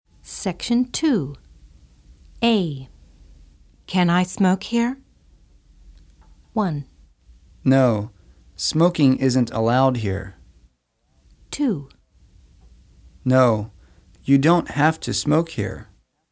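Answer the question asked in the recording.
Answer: 1: No, smoking isn't allowed here.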